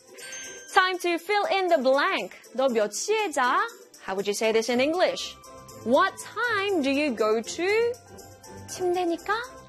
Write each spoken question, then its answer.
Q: What time do you go to? 침대니까?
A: Bed. What time do you go to bed?